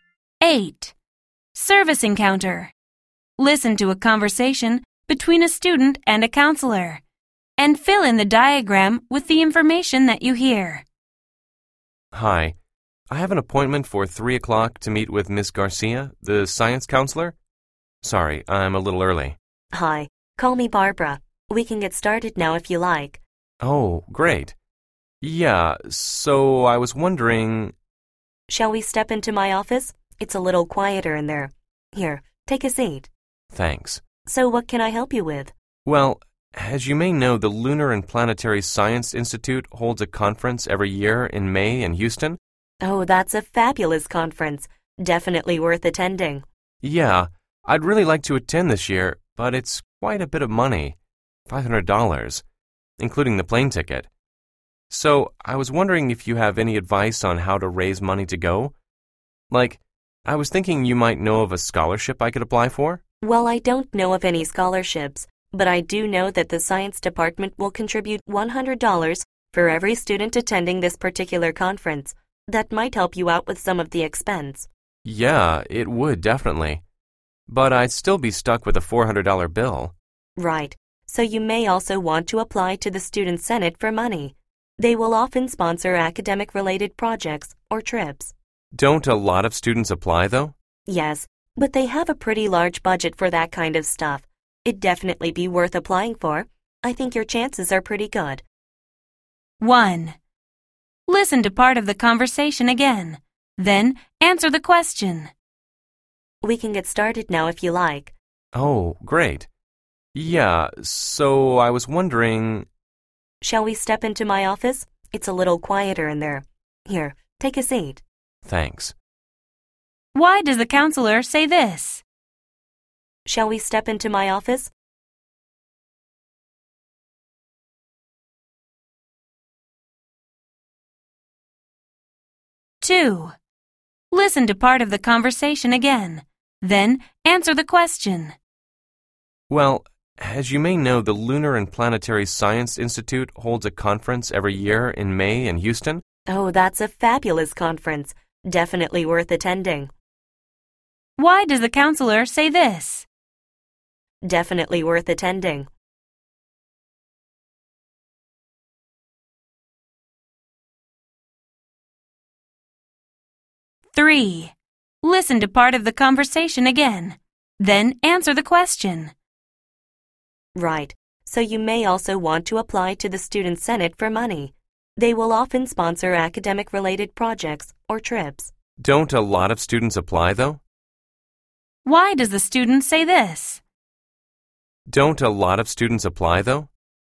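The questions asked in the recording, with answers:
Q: Why does the counselor say this?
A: To suggest they talk somewhere quieter, since it is a little quieter in her office

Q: Why does the counselor say this?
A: To show she thinks the conference is excellent and encourage the student to go

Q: Why does the student say this?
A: He doubts his chances because he thinks many students compete for the money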